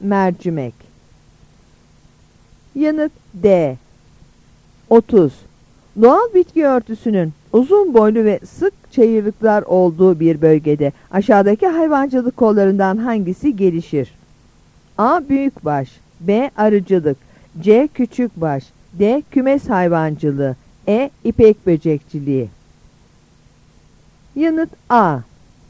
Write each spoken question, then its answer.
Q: Doğal bitki örtüsünün uzun boylu ve sık çayırlıklar olduğu bir bölgede aşağıdaki hayvancılık kollarından hangisi gelişir?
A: Yanıt A.